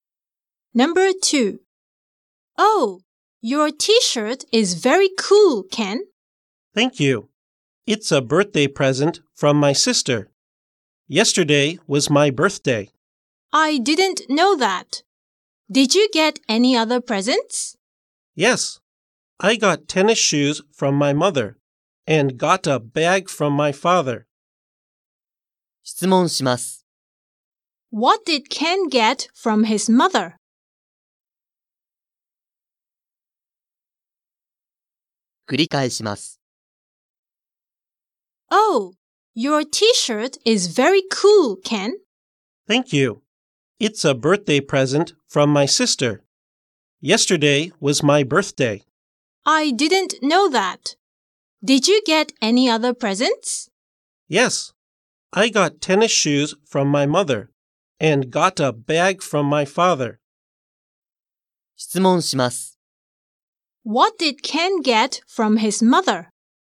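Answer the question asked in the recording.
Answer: Tennis shoes.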